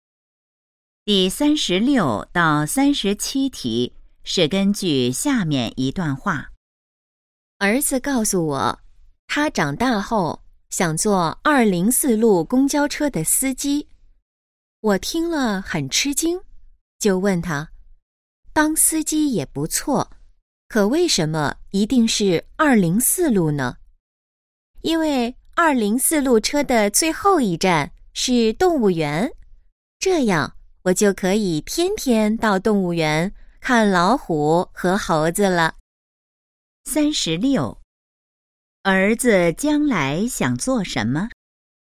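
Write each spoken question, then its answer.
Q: 儿子将来想做什么?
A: 当204路公交车的司机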